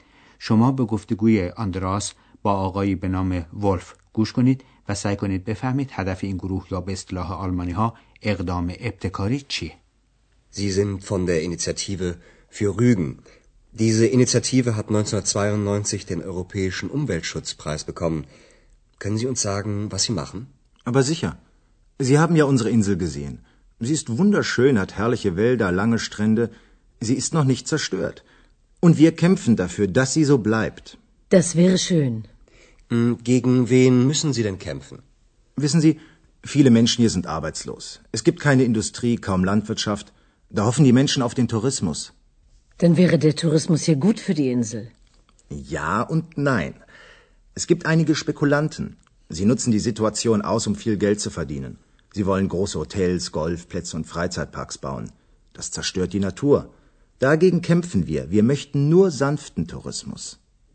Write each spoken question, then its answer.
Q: سعی کنید بفهمید هدف این گروه یا به اصطلاح آلمانی ها اقدام ابتکاری چیه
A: پس هدف از این ابتکار عمل کاهش خسارات ناشی از جهانگردی برای طبیعت جزیره و جلوگیری از افزایش بی‌رویه تأسیسات جهانگردی در اونجاست.